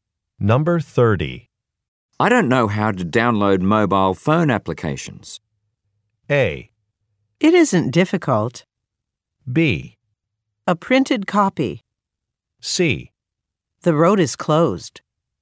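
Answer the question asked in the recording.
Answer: A: It isn't difficult.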